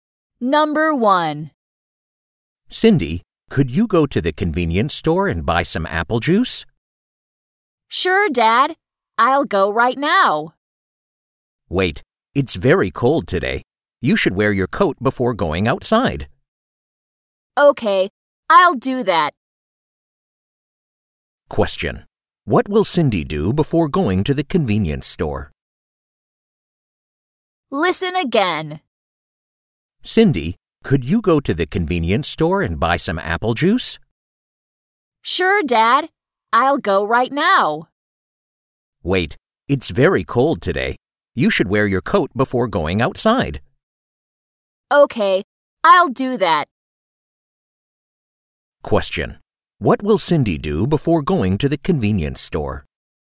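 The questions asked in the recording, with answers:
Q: What will Cindy do before going to the convenience store?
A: Wear her coat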